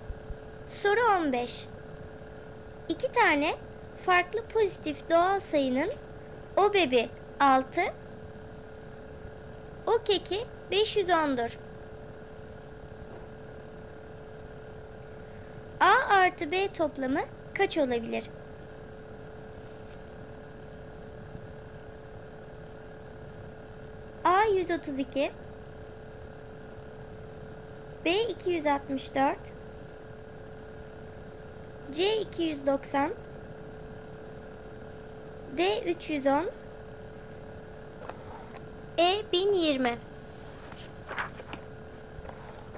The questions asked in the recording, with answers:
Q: A artı B toplamı kaç olabilir?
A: Doğru cevap A 132.